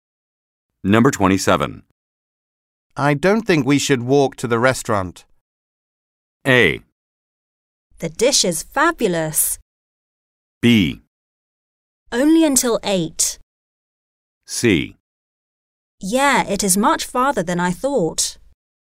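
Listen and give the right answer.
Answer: C: Yeah, it is much farther than I thought.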